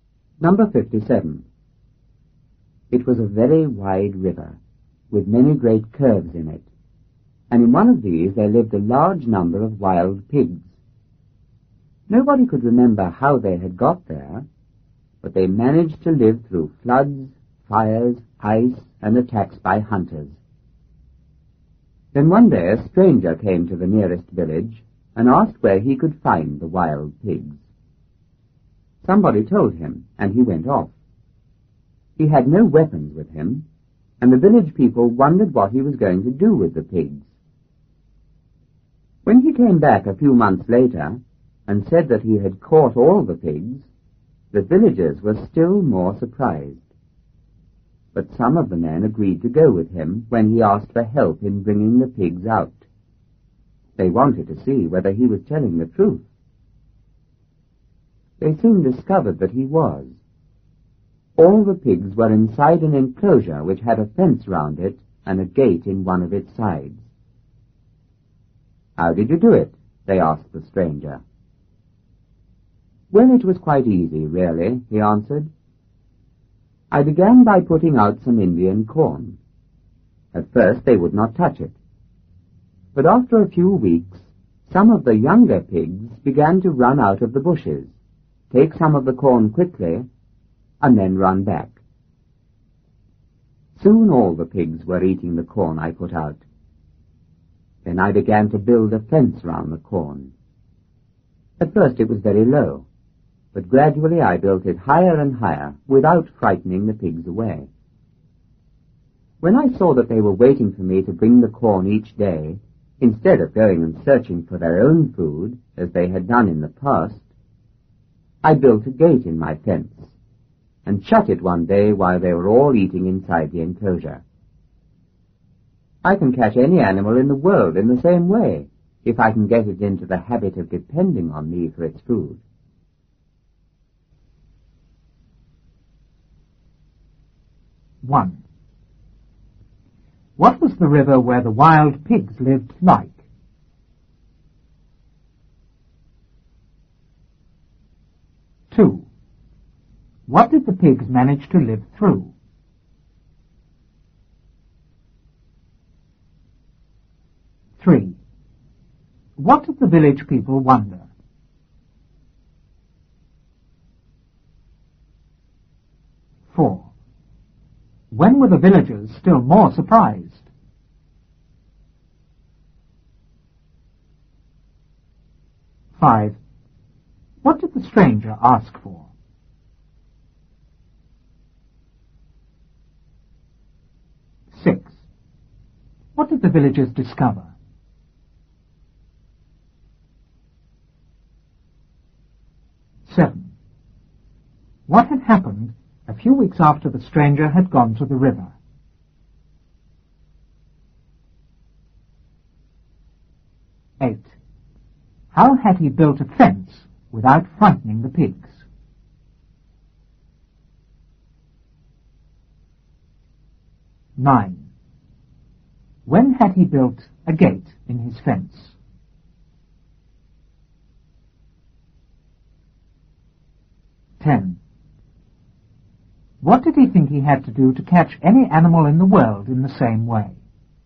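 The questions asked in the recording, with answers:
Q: What was the river where the wild pigs lived like?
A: Very wide, with many great curves in it

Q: What did the pigs manage to live through?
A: Floods, fires, ice, and attacks by hunters

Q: What did the village people wonder?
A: What the stranger was going to do with the pigs

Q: When were the villagers still more surprised?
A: When he came back a few months later and said he had caught all the pigs

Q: What did the stranger ask for?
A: Help in bringing the pigs out

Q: What did the villagers discover?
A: That he was telling the truth; all the pigs were inside a fenced enclosure

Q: What had happened a few weeks after the stranger had gone to the river?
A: Some younger pigs began to run out of the bushes, take some corn quickly and run back

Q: How had he built a fence without frightening the pigs?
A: He built it very low at first and gradually made it higher

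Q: When had he built a gate in his fence?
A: When he saw the pigs were waiting for him to bring corn each day instead of searching for their own food

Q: What did he think he had to do to catch any animal in the world in the same way?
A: Get it into the habit of depending on him for its food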